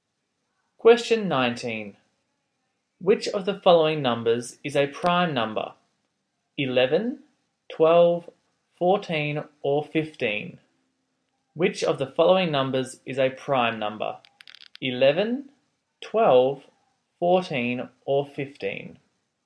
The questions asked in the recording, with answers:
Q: Which of the following numbers is a prime number?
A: 11 is the prime number.